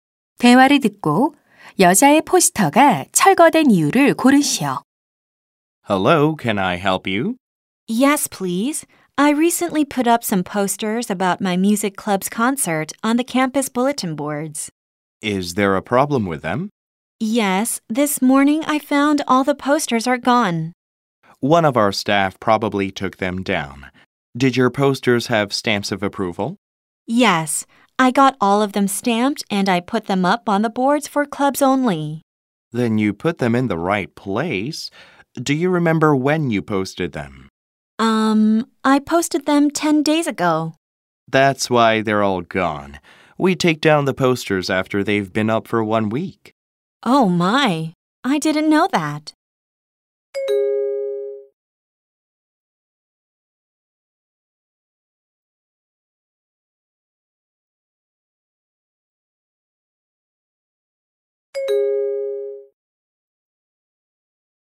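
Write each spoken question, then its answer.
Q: 대화를 듣고 여자의 포스터가 철거된 이유를 고르시오.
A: 게시한 지 일주일이 넘어서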